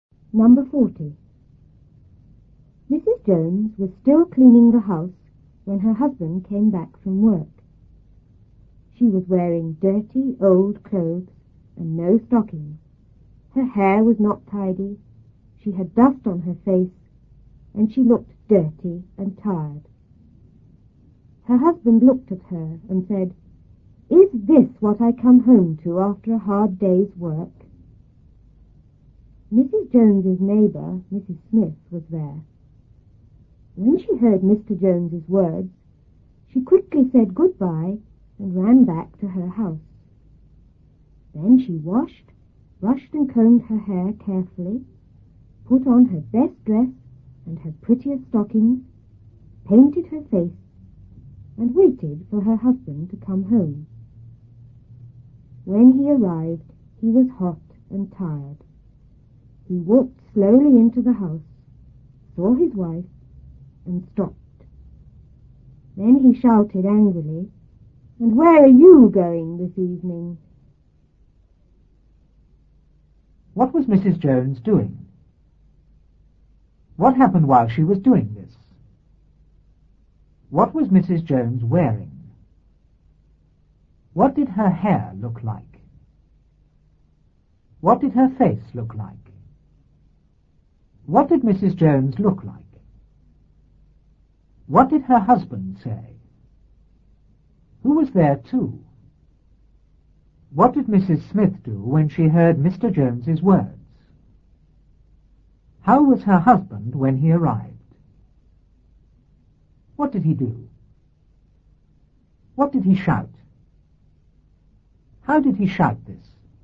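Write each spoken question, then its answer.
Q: What was Mrs. Jones doing?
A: Cleaning the house

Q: What happened while she was doing this?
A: Her husband came back from work

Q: What was Mrs. Jones wearing?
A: Dirty old clothes and no stockings

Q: What did her hair look like?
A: It was not tidy

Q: What did her face look like?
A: It had dust on it

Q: What did Mrs. Jones look like?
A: Dirty and tired

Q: What did her husband say?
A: Is this what I come home to after a hard day's work?

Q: Who was there too?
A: Mrs. Smith, the neighbor

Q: What did Mrs. Smith do when she heard Mr. Jones's words?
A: She quickly said goodbye and ran back to her house

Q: How was her husband when he arrived?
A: Hot and tired

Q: What did he do?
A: He walked slowly into the house, saw his wife, and stopped

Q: What did he shout?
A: And where are you going this evening?

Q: How did he shout this?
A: Angrily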